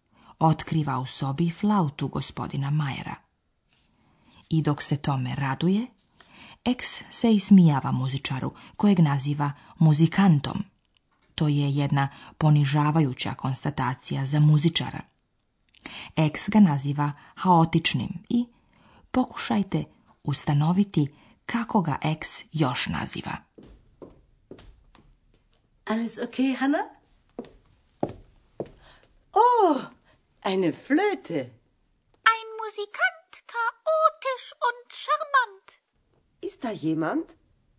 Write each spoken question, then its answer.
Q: X ga naziva haotičnim i pokušajte ustanoviti kako ga X još naziva.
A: X dakle naziva muzičara još i šarmantnim.